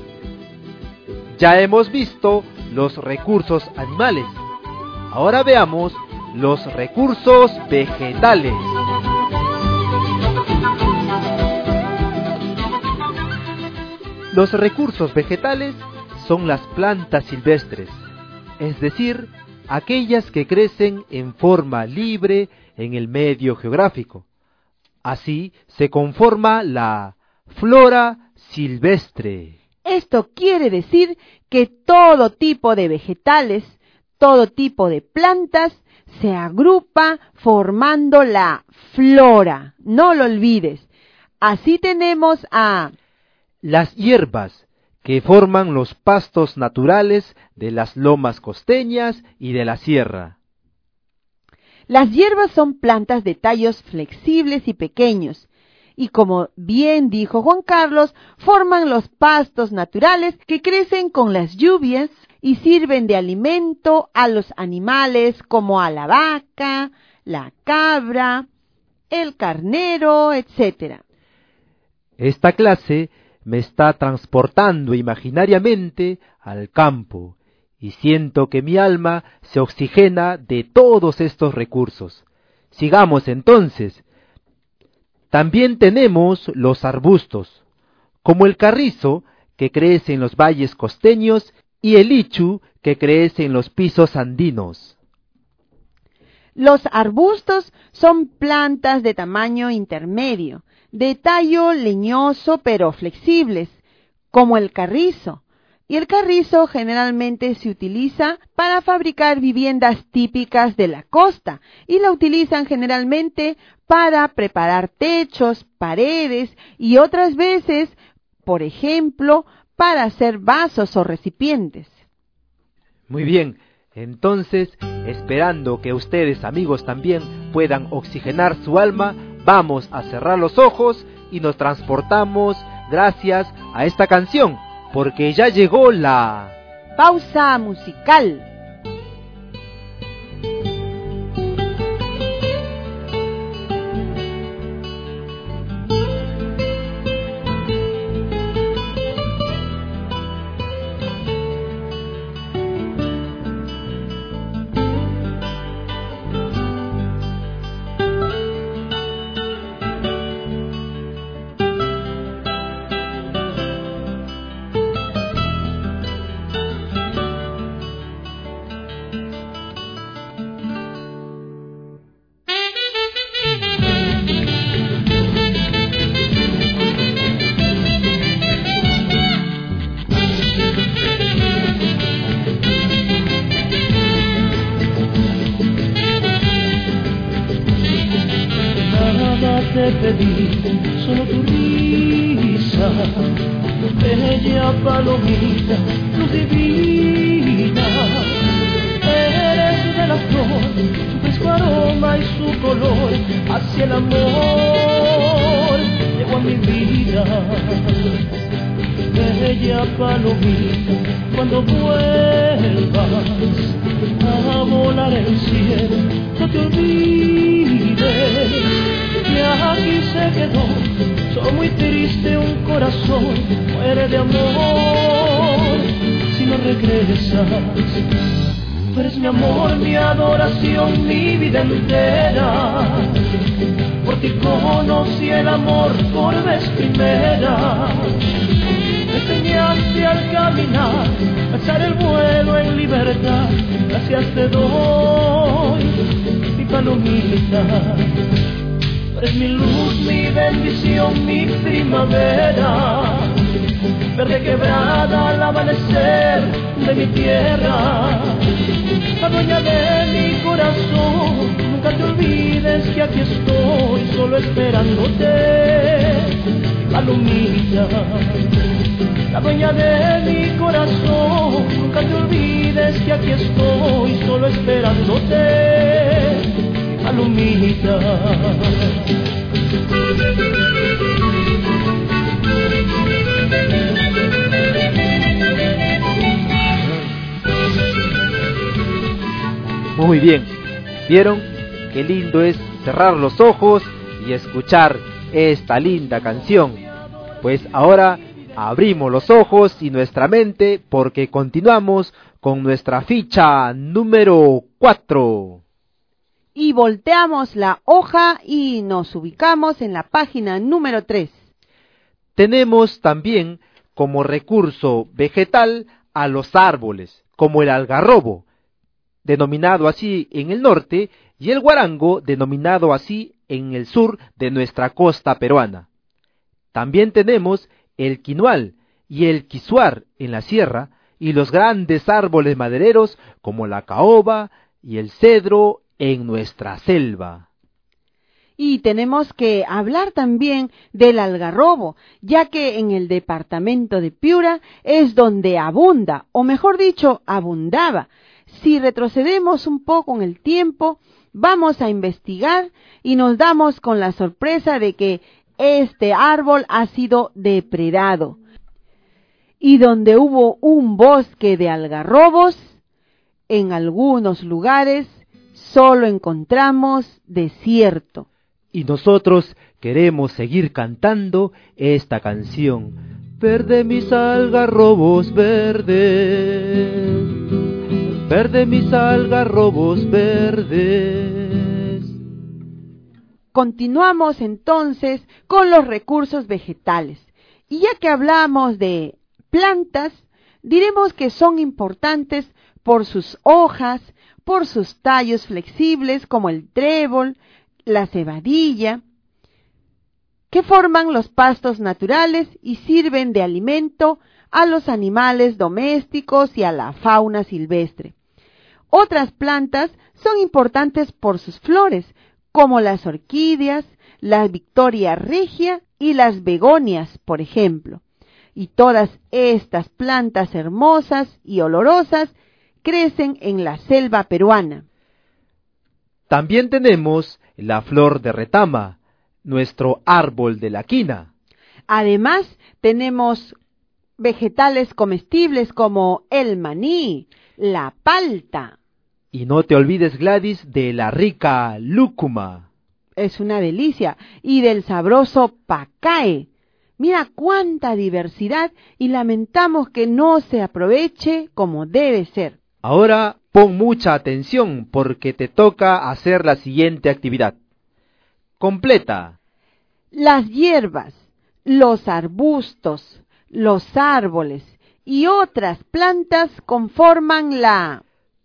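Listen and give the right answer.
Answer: flora silvestre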